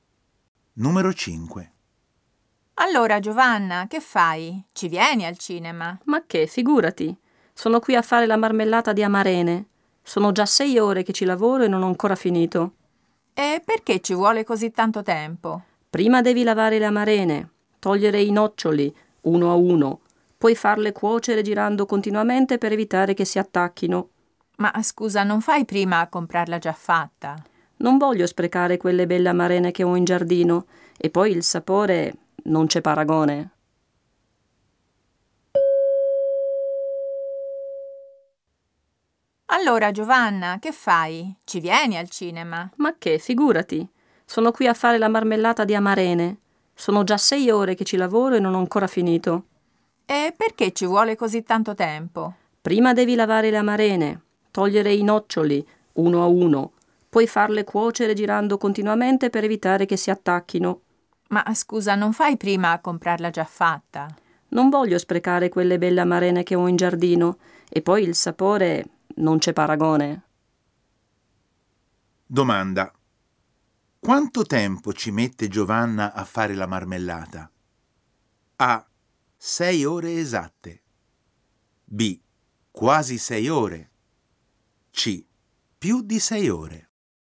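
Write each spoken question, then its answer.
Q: Quanto tempo ci mette Giovanna a fare la marmellata?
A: C: Più di 6 ore.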